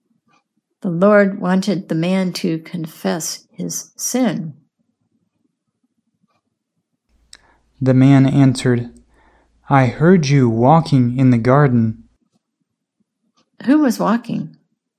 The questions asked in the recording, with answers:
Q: Who was walking?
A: God was walking.